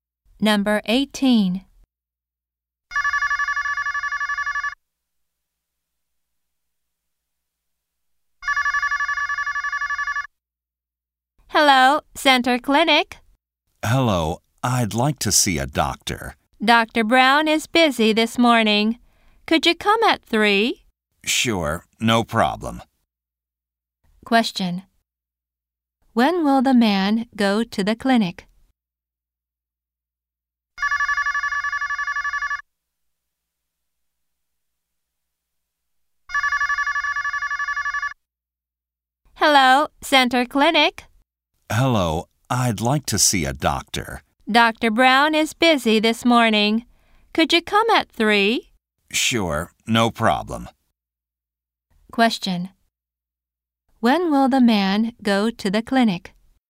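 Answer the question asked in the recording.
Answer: At 3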